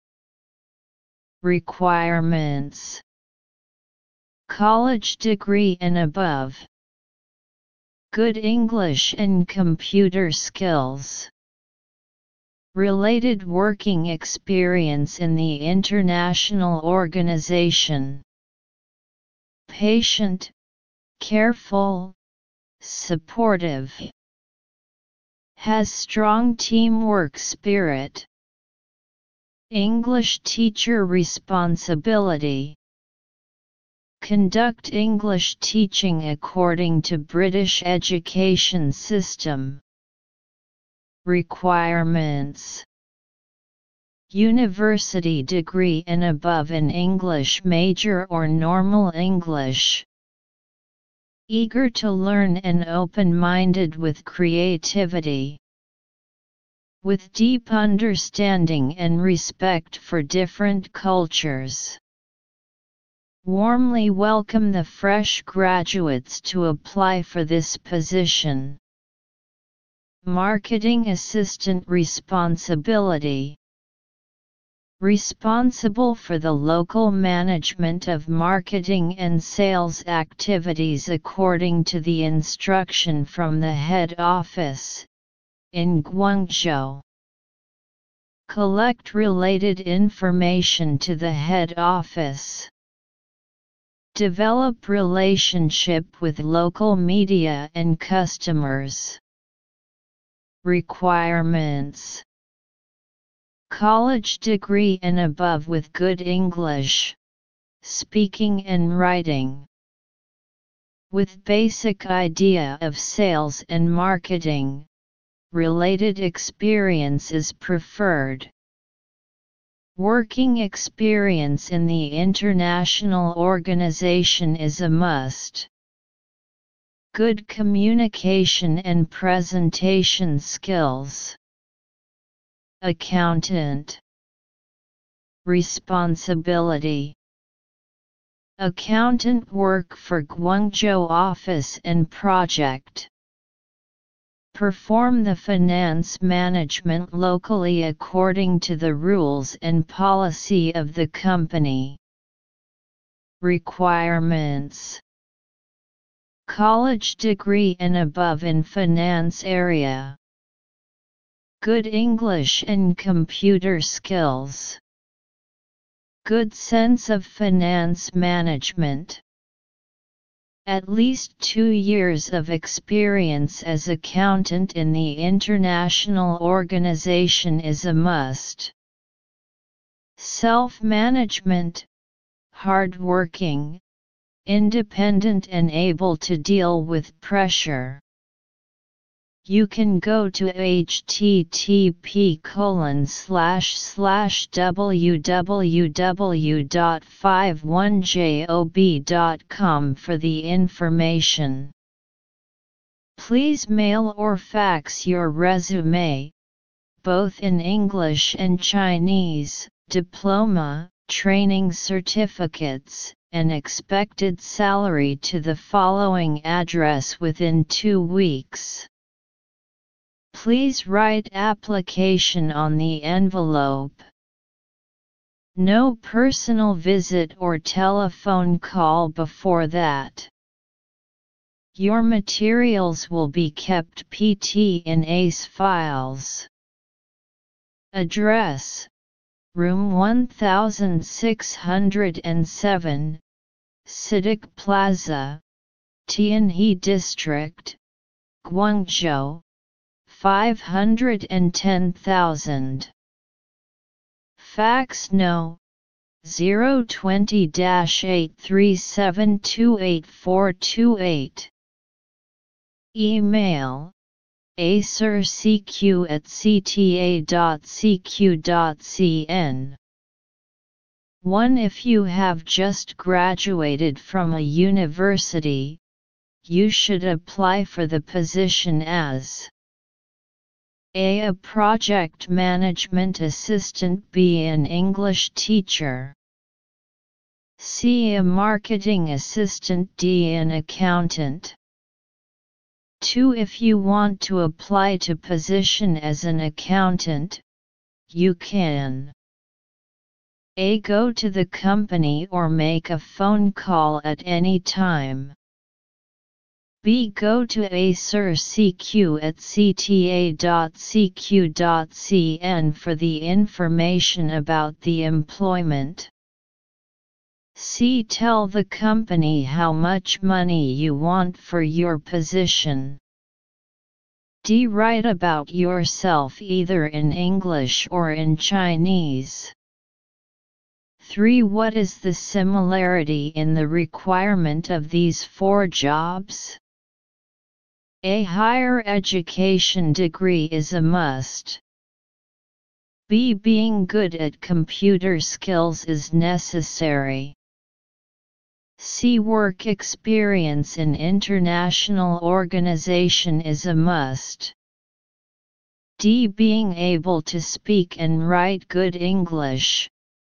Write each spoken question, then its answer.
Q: If you have just graduated from a university, you should apply for the position as a.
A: Answer 1. B